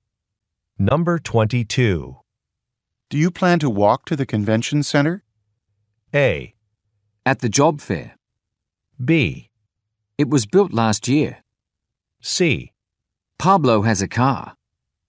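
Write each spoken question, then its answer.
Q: Do you plan to walk to the convention center?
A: C: Pablo has a car.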